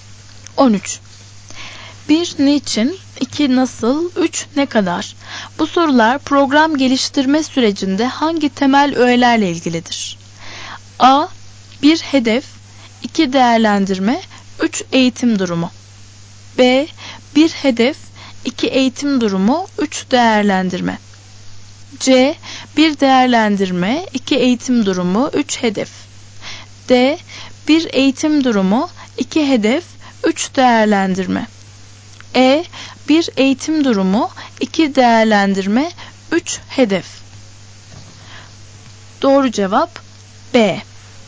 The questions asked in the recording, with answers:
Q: Bu sorular program geliştirme sürecinde hangi temel öğelerle ilgilidir?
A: Doğru cevap B.